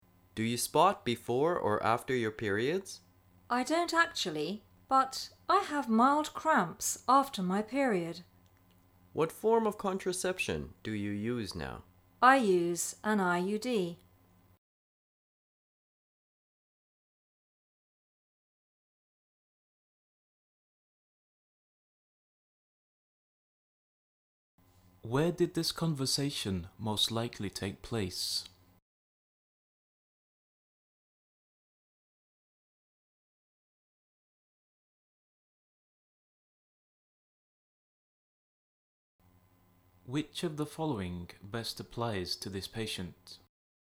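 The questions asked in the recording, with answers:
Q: Where did this conversation most likely take place?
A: At a doctor's (gynecologist's) office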